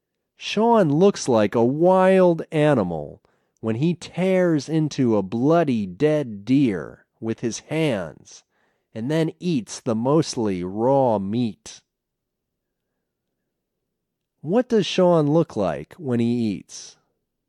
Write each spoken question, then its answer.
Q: What does Sean look like when he eats?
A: Sean looks like a wild animal when he eats.